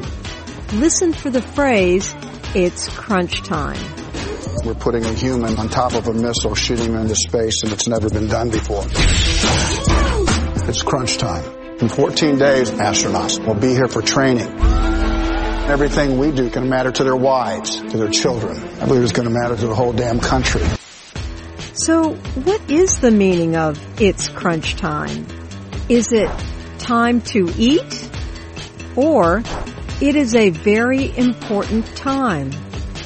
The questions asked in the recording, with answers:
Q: So what is the meaning of it's crunch time?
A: It's crunch time means it is a very important time.